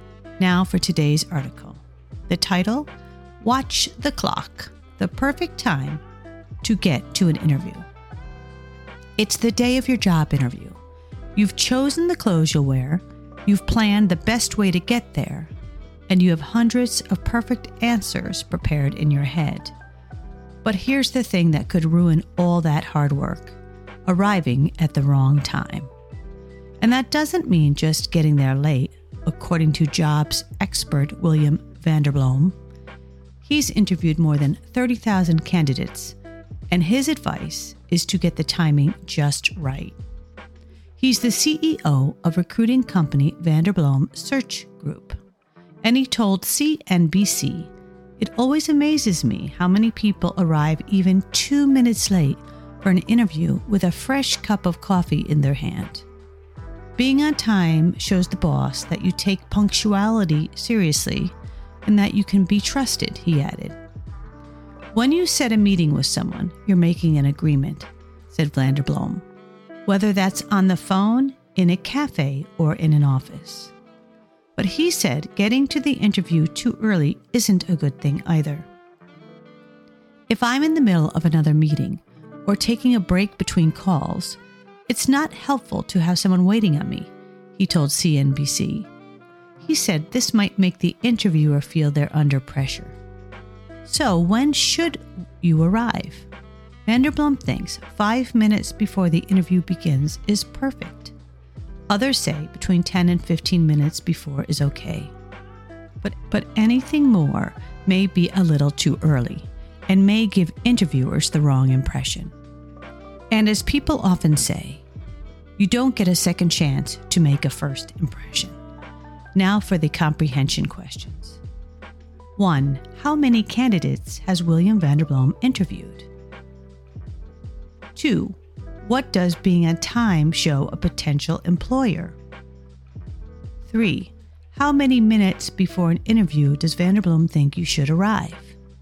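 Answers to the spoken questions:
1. More than 30,000
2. That you take punctuality seriously and can be trusted
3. 5 minutes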